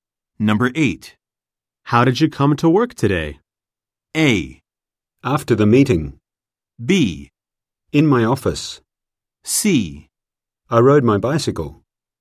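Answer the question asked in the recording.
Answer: C: I rode my bicycle.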